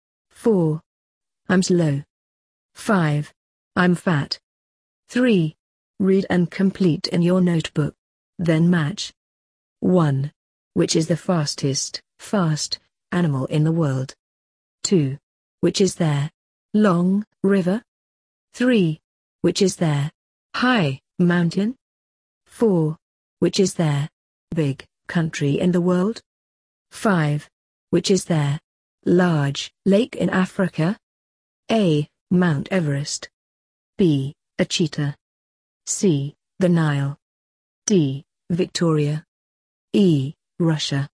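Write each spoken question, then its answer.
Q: Which is the fast animal in the world?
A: B: A cheetah

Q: Which is there? Long river?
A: C: The Nile

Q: Which is there? High mountain?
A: A: Mount Everest

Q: Which is there? Big country in the world?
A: E: Russia

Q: Which is there? Large lake in Africa?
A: D: Victoria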